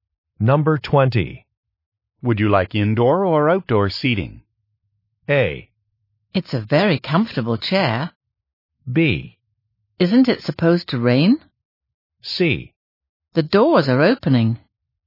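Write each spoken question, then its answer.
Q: Would you like indoor or outdoor seating?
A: B: Isn't it supposed to rain?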